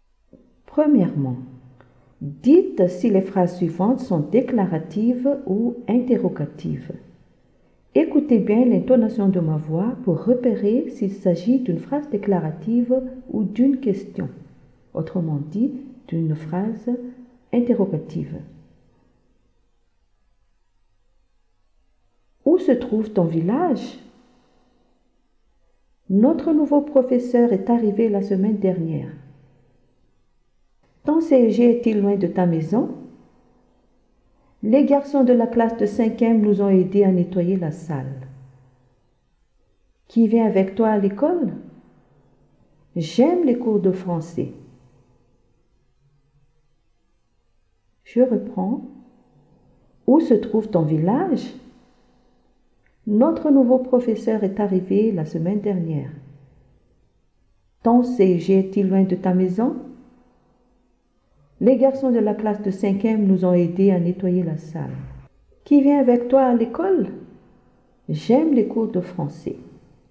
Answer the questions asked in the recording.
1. Est une phrase interrogative.
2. C'est une phrase déclarative.
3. C'est une phrase interrogative.
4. Phrase déclarative.
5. Phrase interrogative.
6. j'aime les cours de français est une phrase déclarative.